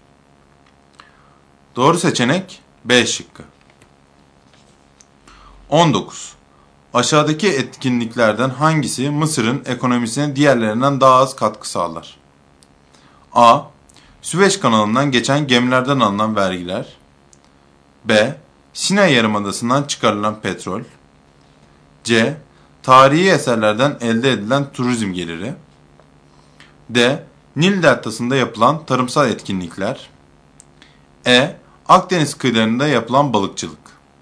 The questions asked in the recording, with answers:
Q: Aşağıdaki etkinliklerden hangisi Mısır'ın ekonomisine diğerlerinden daha az katkı sağlar?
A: Doğru seçenek E şıkkı.